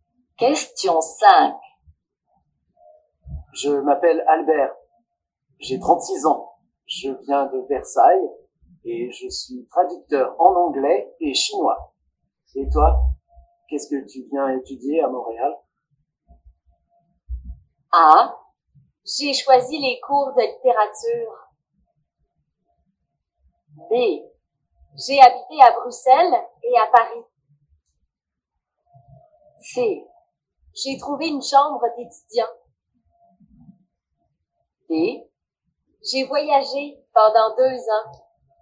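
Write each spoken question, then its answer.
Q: Et toi, qu'est-ce que tu viens étudier à Montréal?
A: A: J'ai choisi les cours de littérature.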